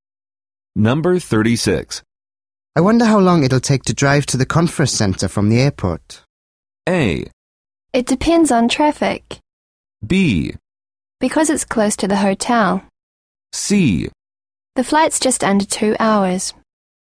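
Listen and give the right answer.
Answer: A: It depends on traffic.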